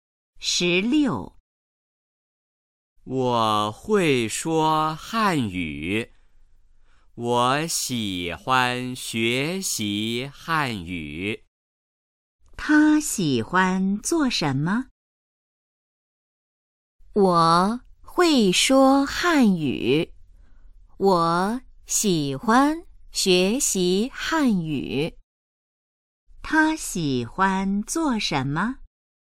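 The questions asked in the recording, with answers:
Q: 他喜欢做什么?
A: 学习汉语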